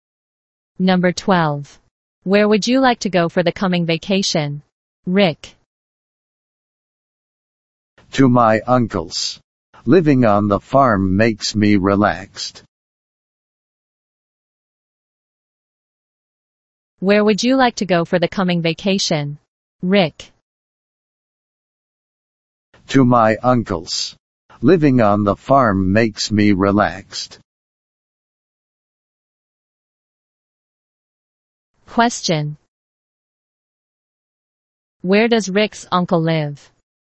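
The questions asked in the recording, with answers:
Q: Where does Rick's uncle live?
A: On a farm.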